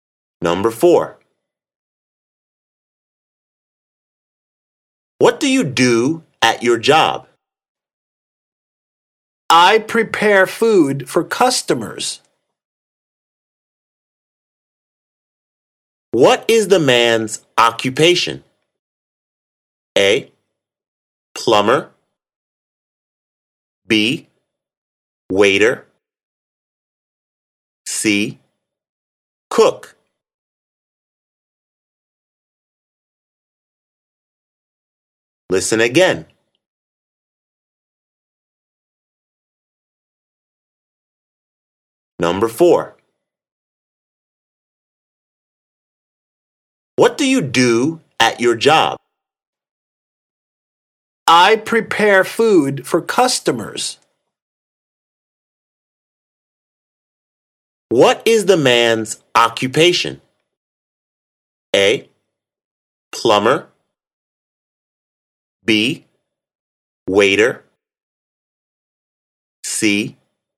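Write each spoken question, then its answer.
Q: What is the man's occupation?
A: C: Cook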